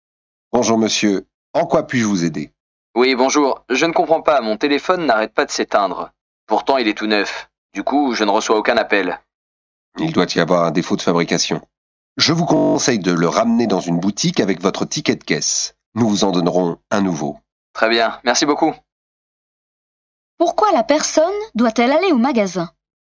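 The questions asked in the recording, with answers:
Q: Pourquoi la personne doit-elle aller au magasin?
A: Son téléphone neuf n'arrête pas de s'éteindre (défaut de fabrication) ; on lui en donnera un nouveau.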